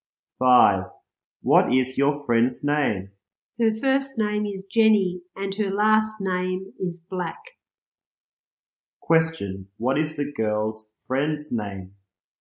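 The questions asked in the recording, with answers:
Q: What is the girl's friend's name?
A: Jenny Black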